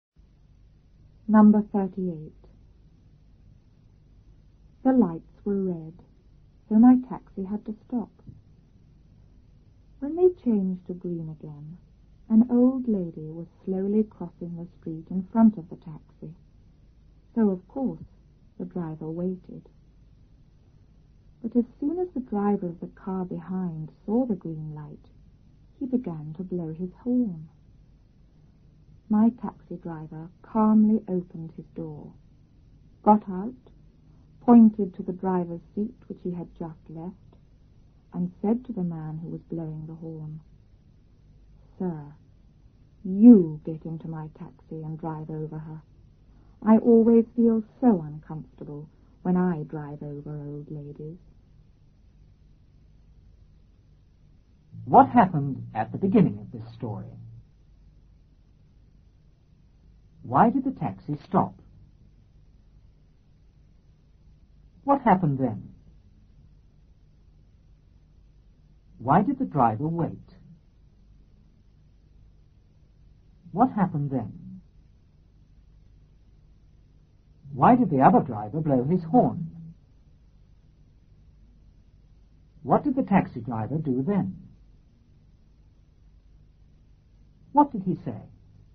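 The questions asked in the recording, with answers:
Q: Why did the taxi stop?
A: Because the lights were red

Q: Why did the driver wait?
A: An old lady was slowly crossing the street in front of the taxi

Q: Why did the other driver blow his horn?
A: Because he saw the green light

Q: What did he say?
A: "Sir, you get into my taxi and drive over her. I always feel so uncomfortable when I drive over old ladies."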